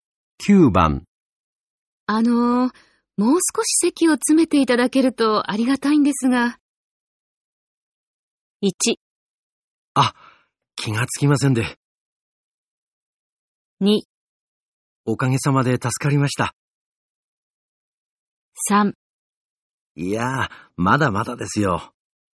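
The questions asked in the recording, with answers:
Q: もう少し席を詰めていただけるとありがたいんですが。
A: 1: あ、気がつきませんで。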